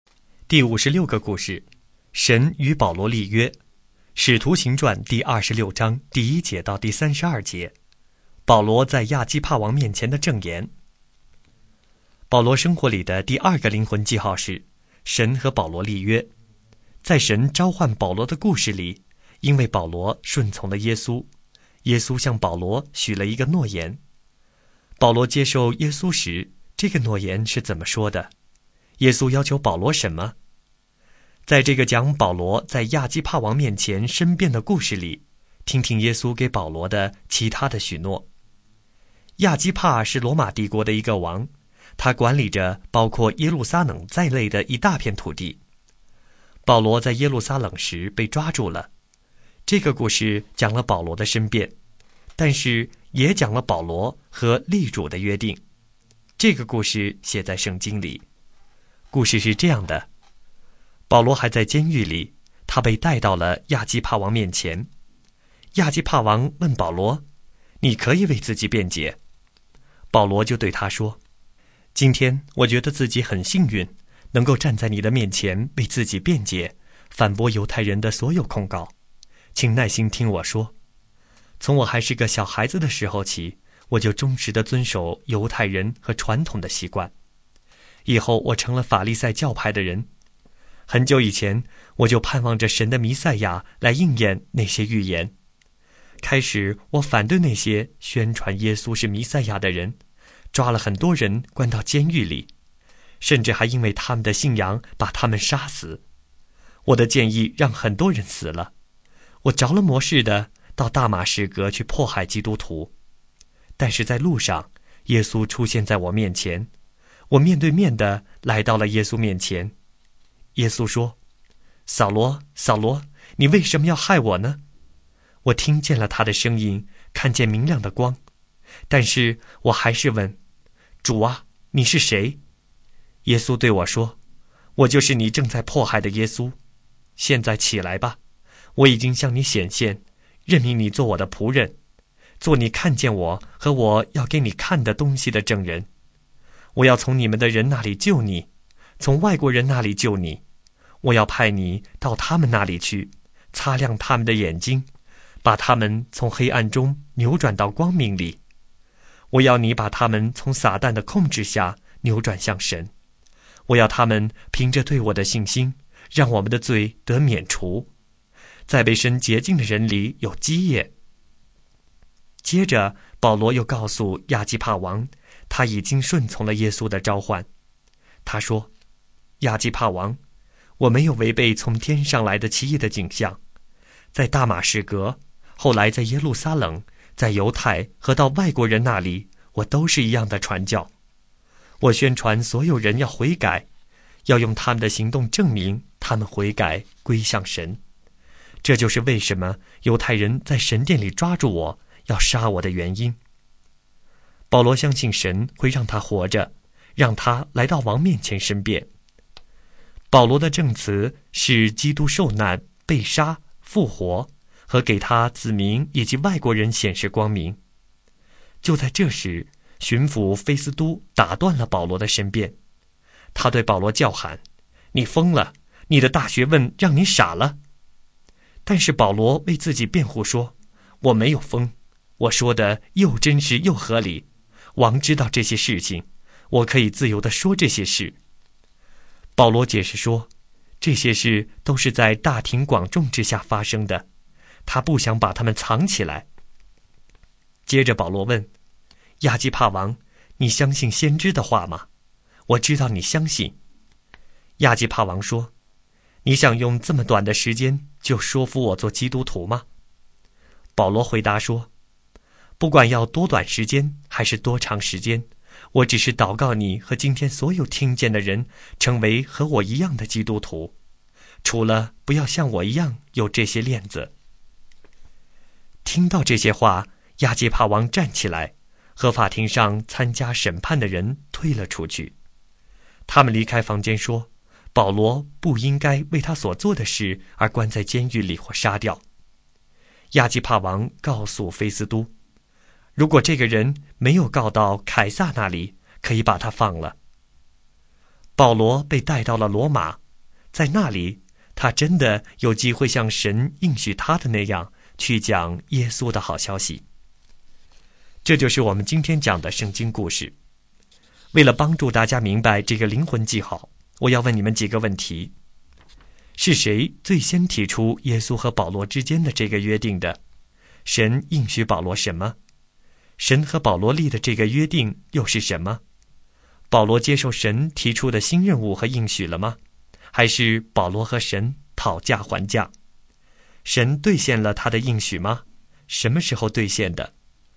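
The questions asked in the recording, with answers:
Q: 是谁最先提出耶稣和保罗之间的这个约定的?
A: 耶稣

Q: 保罗接受神提出的新任务和应许了吗?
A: 接受了

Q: 神兑现了他的应许吗?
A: 兑现了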